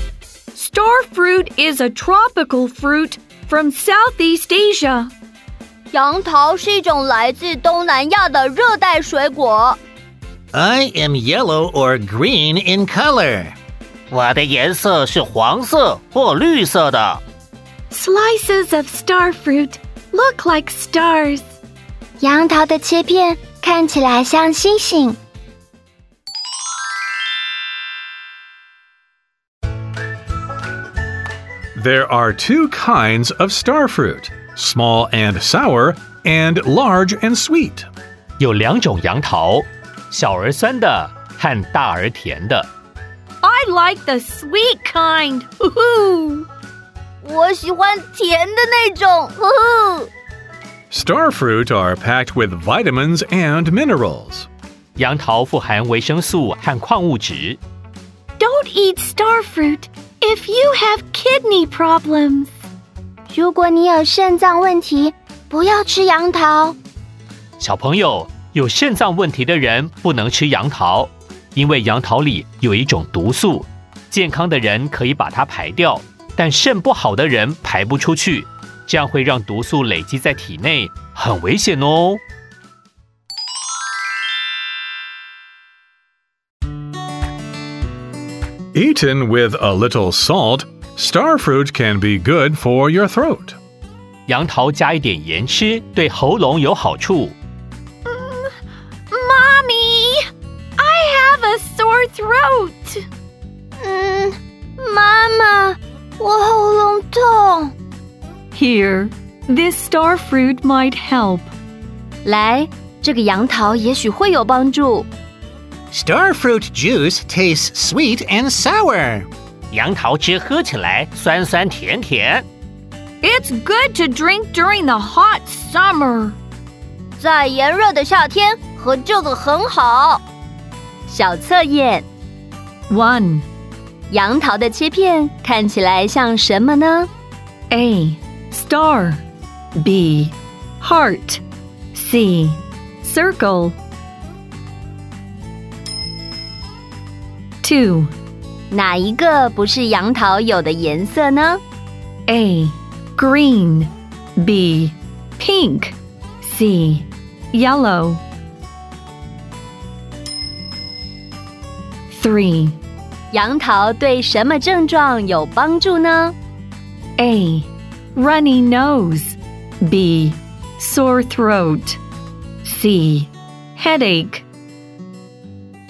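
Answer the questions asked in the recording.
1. A: Star
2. B: Pink
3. B: Sore throat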